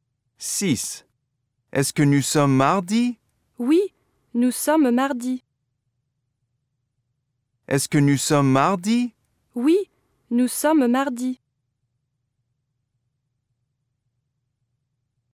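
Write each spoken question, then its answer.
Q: Est-ce que nous sommes mardi?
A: oui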